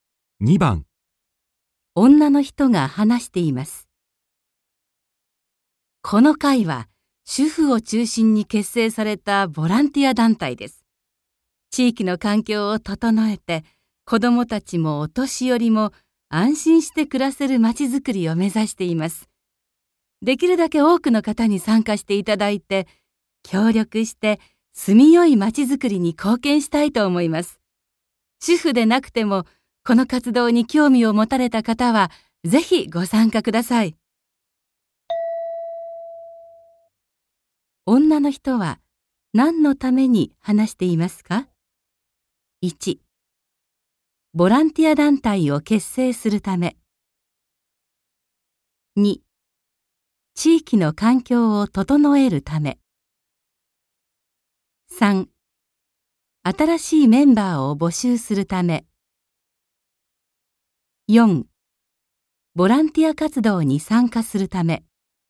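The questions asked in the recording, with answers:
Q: 女の人は、何のために話していますか ?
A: 3: 新しいメンバーを募集するため。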